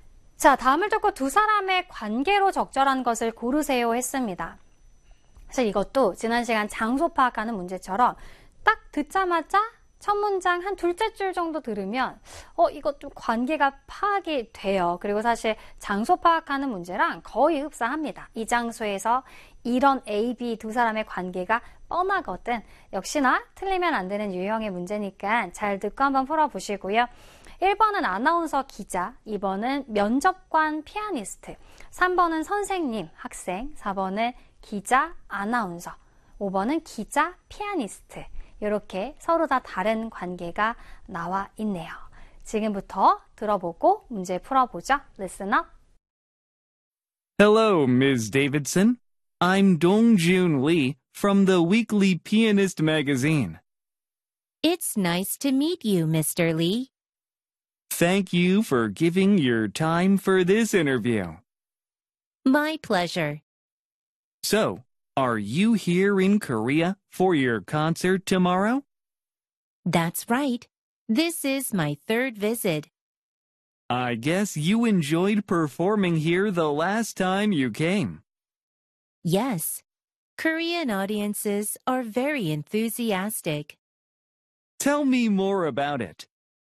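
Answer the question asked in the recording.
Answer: 5번: 기자 피아니스트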